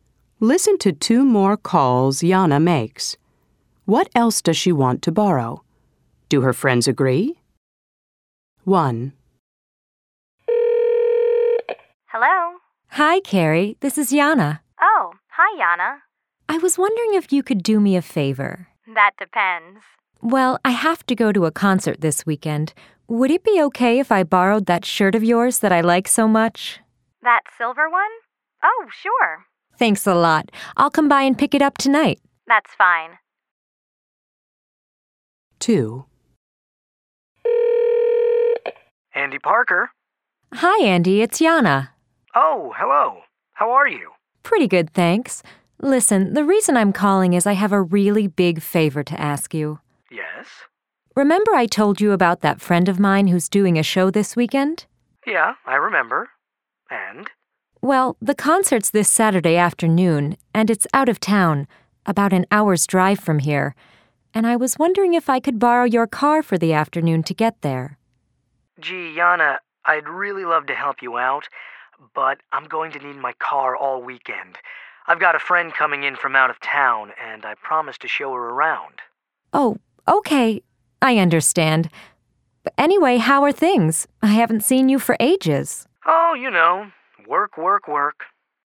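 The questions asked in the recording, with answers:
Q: What else does she want to borrow?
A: Carrie's silver shirt and Andy's car

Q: Do her friends agree?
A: Carrie agrees; Andy says no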